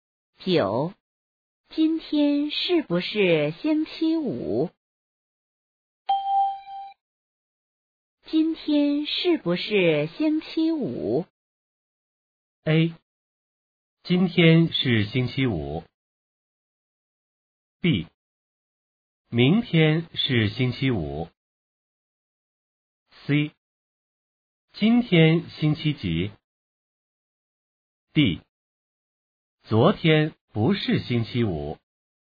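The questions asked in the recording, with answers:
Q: 今天是不是星期五?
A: A: 今天是星期五。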